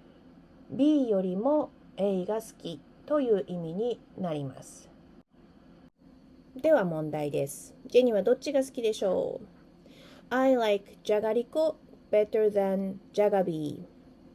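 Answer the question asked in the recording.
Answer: じゃがりこ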